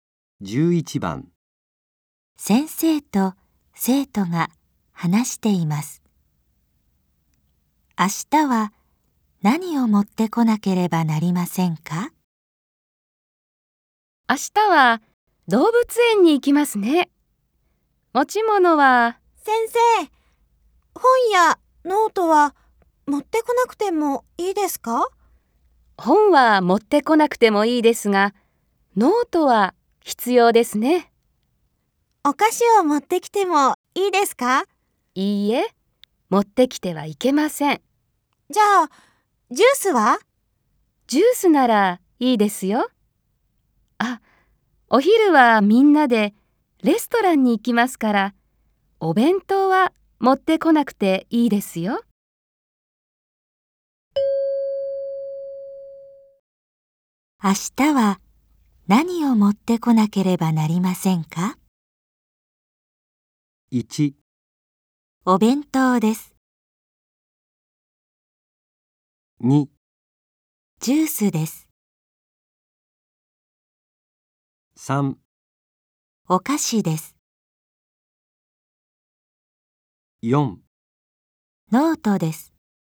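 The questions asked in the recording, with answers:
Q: 明日は何を持ってこなければなりませんか?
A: 4: ノートです。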